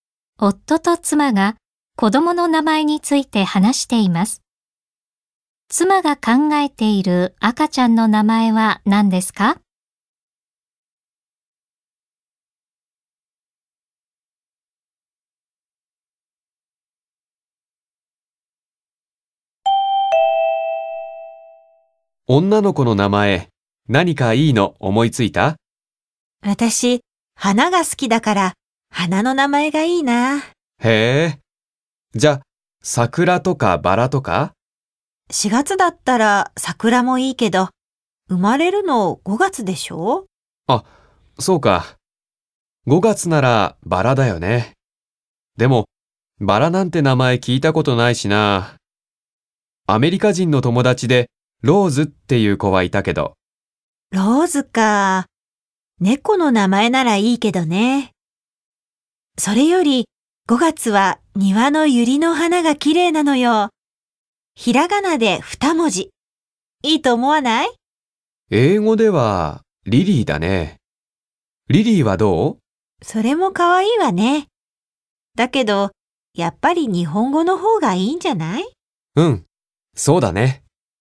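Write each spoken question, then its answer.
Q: 妻が考えている赤ちゃんの名前は何ですか?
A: ゆり(百合)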